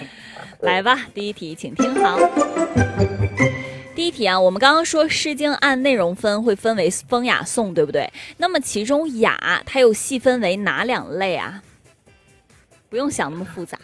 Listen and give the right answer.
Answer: 就是大雅和小雅